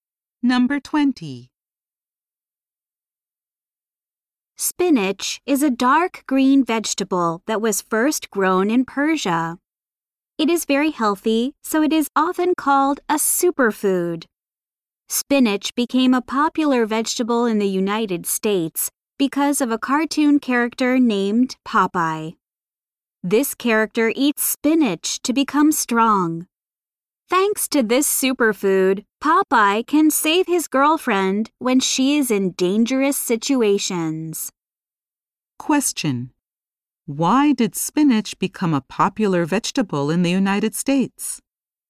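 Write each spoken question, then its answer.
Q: Why did spinach become a popular vegetable in the United States?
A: Because of the cartoon character Popeye, who eats spinach to become strong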